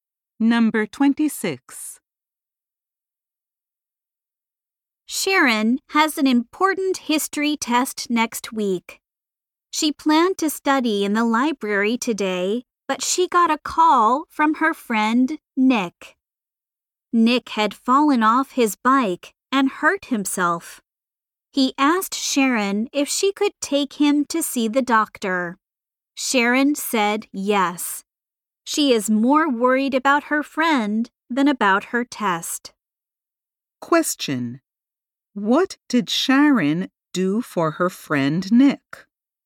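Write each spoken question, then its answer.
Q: What did Sharon do for her friend Nick?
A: She took him to see the doctor.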